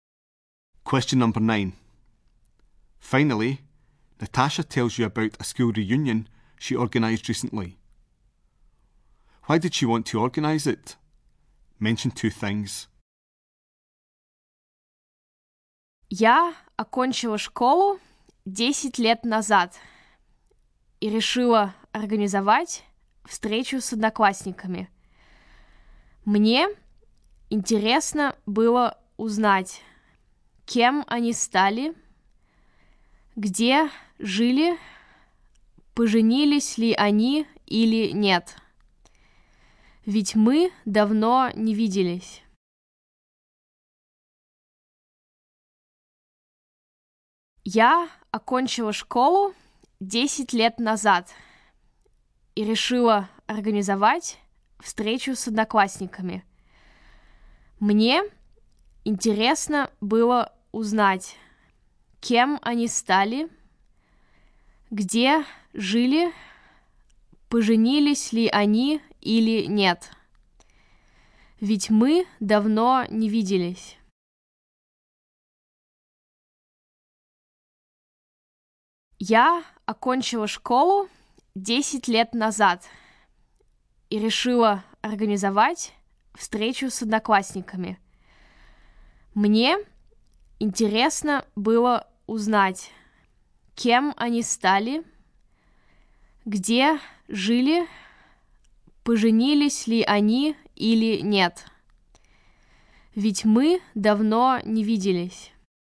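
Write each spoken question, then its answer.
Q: Why did she want to organise it?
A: To find out what classmates became, where they lived, whether they married; they hadn't seen each other for a long time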